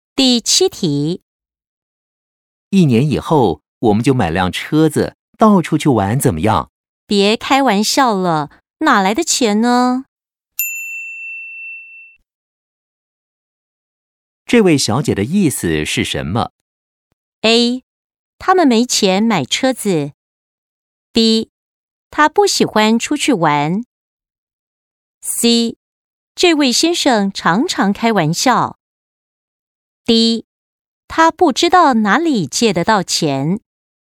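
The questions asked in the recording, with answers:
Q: 这位小姐的意思是什么?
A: A: 他们没钱买车子。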